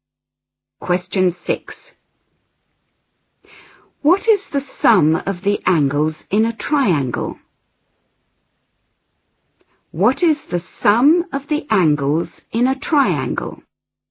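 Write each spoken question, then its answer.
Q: What is the sum of the angles in a triangle?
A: 180 degrees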